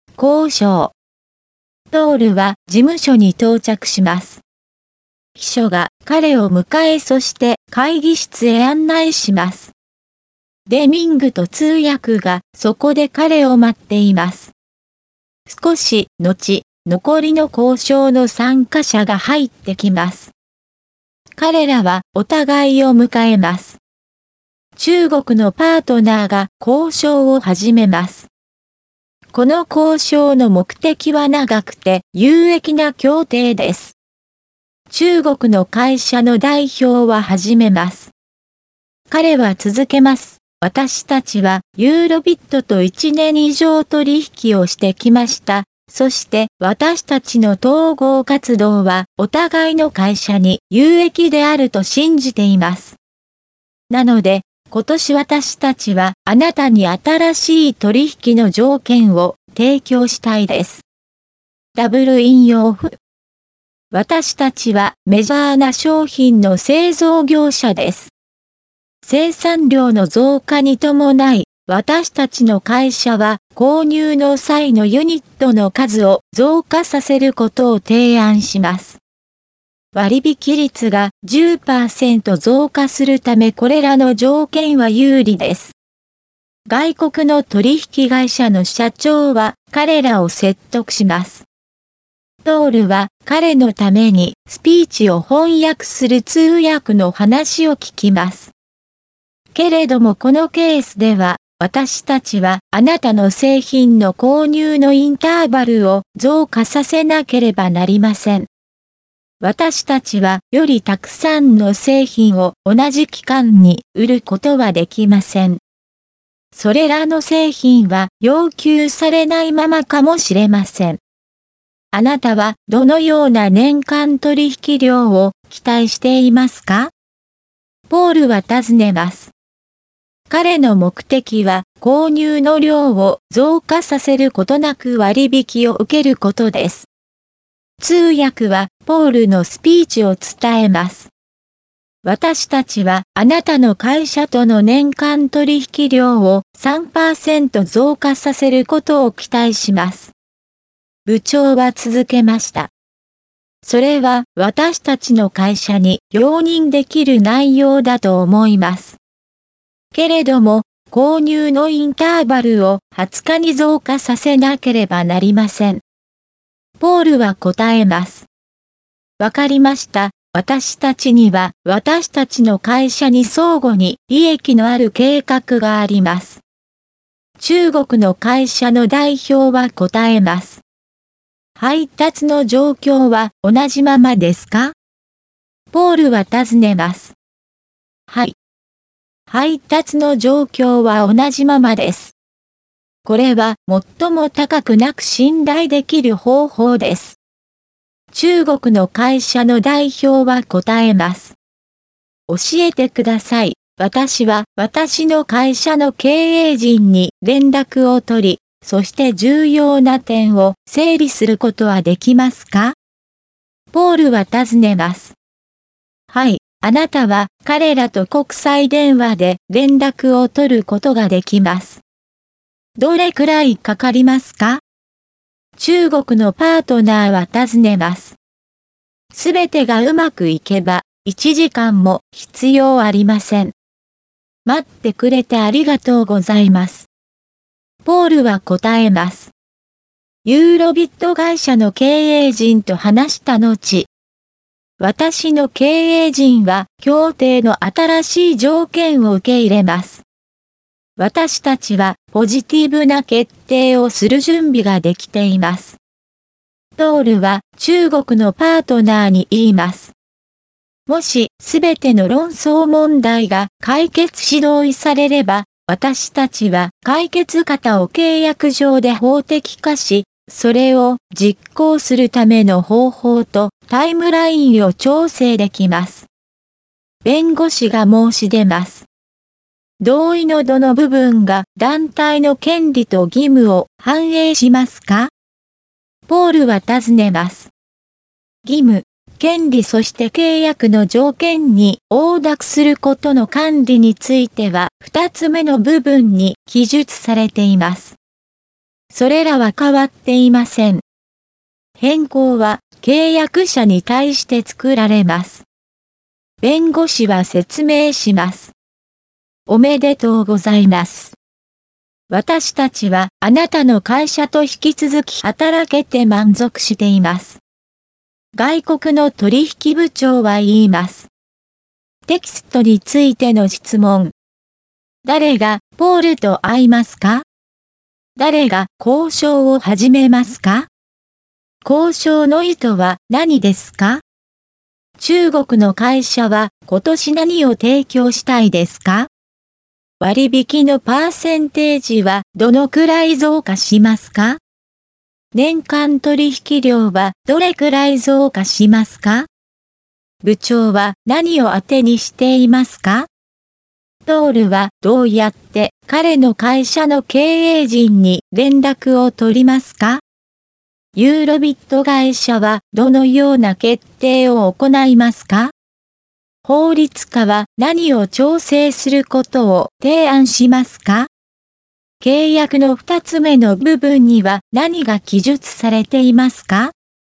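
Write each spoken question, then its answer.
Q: 誰が交渉を始めますか?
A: 中国のパートナー

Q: 交渉の意図は何ですか?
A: 長くて有益な協定

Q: 中国の会社は今年何を提供したいですか?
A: 新しい取引の条件

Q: 割引のパーセンテージはどのくらい増加しますか?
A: 10%

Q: トールはどうやって彼の会社の経営陣に連絡を取りますか?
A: 国際電話で

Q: ユーロビット会社はどのような決定を行いますか?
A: 協定の新しい条件を受け入れる(ポジティブな決定)

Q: 法律家は何を調整することを提案しますか?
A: 解決方を実行するための方法とタイムライン

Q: 契約の二つ目の部分には何が記述されていますか?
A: 義務、権利、契約の条件に応諾することの管理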